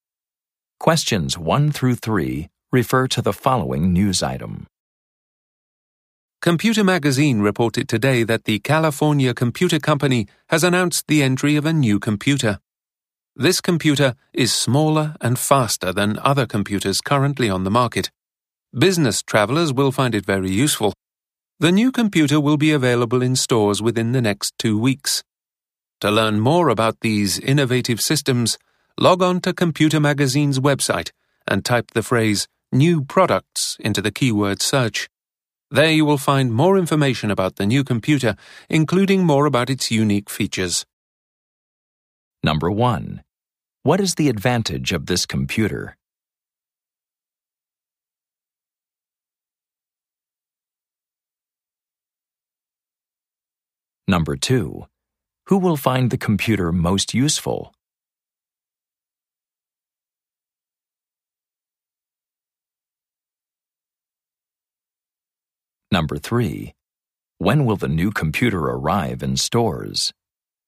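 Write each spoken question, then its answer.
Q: What is the advantage of this computer?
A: It is smaller and faster

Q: Who will find the computer most useful?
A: Business travelers

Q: When will the new computer arrive in stores?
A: Within the next 2 weeks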